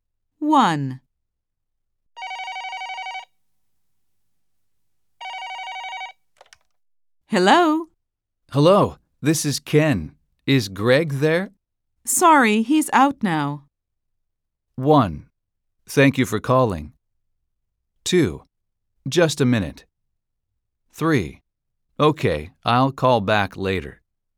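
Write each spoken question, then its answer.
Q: Sorry, he's out now.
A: 3: Okay, I'll call back later.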